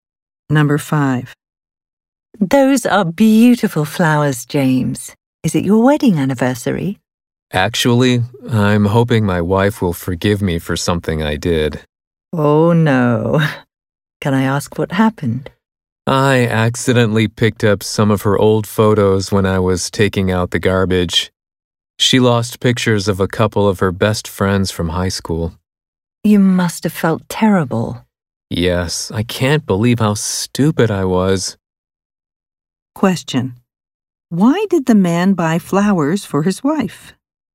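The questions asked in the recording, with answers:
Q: Why did the man buy flowers for his wife?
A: To apologize for accidentally throwing away her old photos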